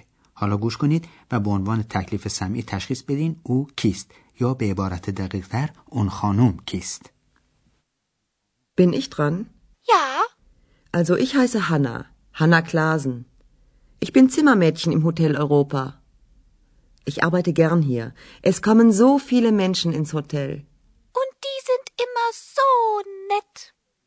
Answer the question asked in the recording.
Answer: پس او هانا کلازن نام داره و در هتل اروپا اتاق داره یعنی مأمور مرتب کردن و نظافت اتاق هاست